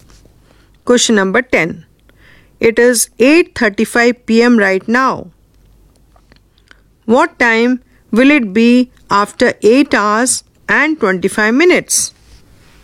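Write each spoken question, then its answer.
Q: What time will it be after 8 hours and 25 minutes?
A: 5:00 a.m.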